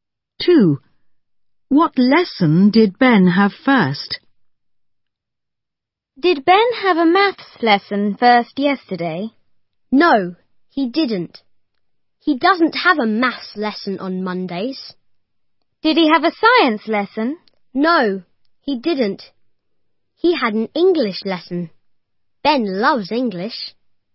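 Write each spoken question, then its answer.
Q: What lesson did Ben have first?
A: English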